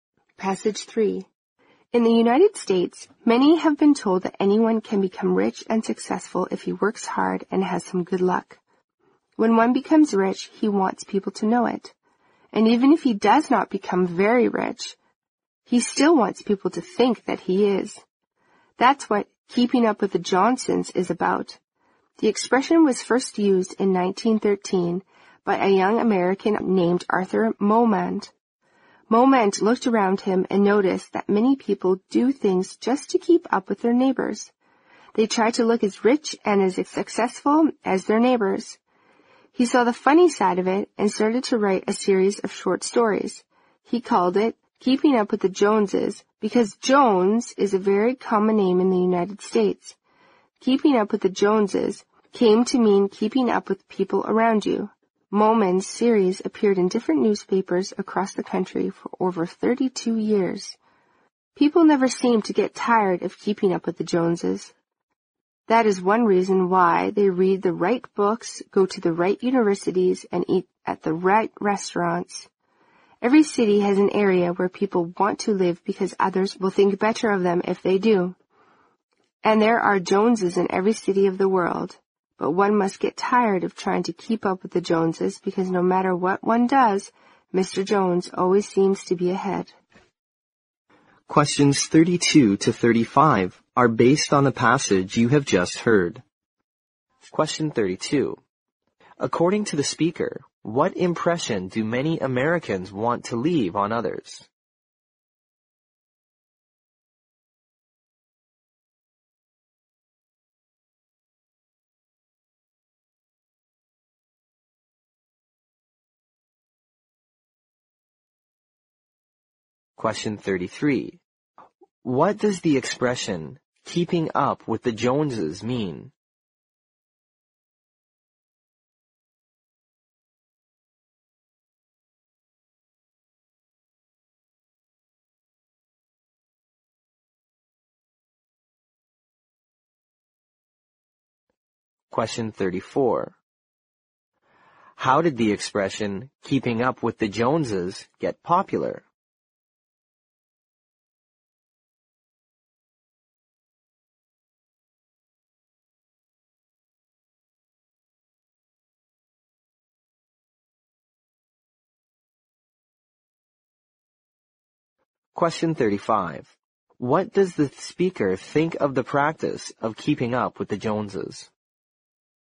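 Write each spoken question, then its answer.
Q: According to the speaker, what impression do many Americans want to leave on others?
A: That they are rich and successful

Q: What does the expression, keeping up with the Joneses, mean?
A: Keeping up with the people around you, trying to look as rich and successful as your neighbors

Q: How did the expression, keeping up with the Joneses, get popular?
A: Through Arthur Momand's series of stories, which ran in newspapers across the country for over 32 years

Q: What does the speaker think of the practice of keeping up with the Joneses?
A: It is tiring and useless, because the Joneses always seem to be ahead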